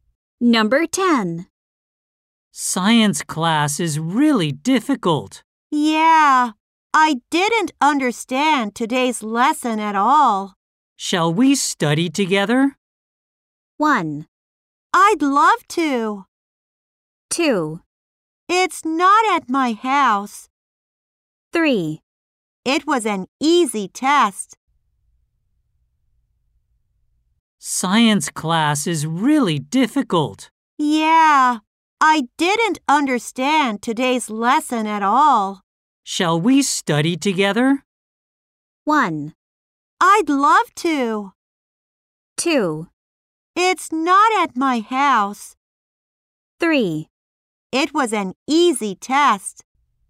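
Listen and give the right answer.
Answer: 1: I'd love to.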